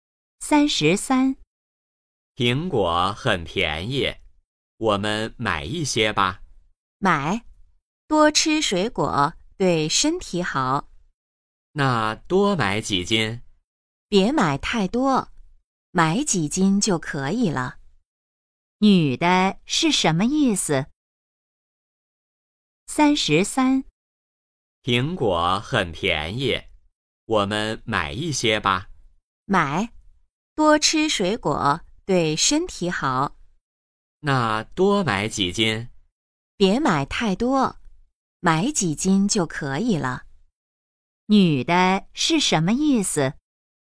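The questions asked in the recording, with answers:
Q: 女的是什么意思?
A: 别买太多,买几斤就可以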